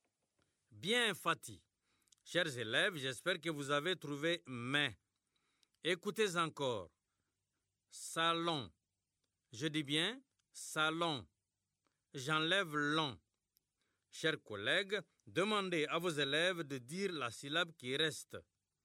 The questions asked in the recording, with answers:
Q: J'enlève l'on. Chers collègues, demandez à vos élèves de dire la syllabe qui reste.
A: Il reste ça.